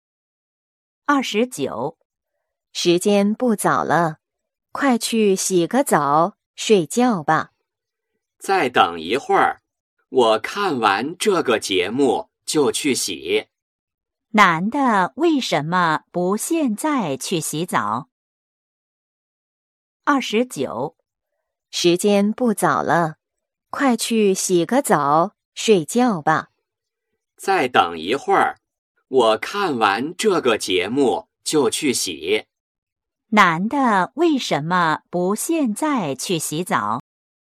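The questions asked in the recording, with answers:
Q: 男的为什么不现在去洗澡?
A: 想看完这个节目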